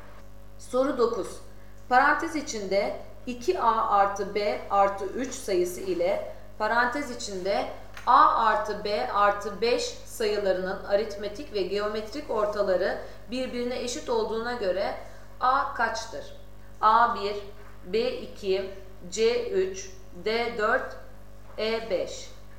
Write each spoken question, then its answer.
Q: Parantez içinde 2A artı B artı 3 sayısı ile parantez içinde A artı B artı 5 sayılarının aritmetik ve geometrik ortaları birbirine eşit olduğuna göre A kaçtır?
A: Doğru cevap B 2.